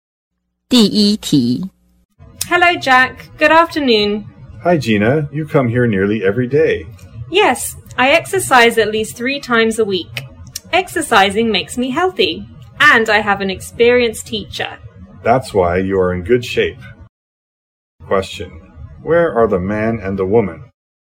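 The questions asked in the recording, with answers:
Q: Where are the man and the woman?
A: At a gym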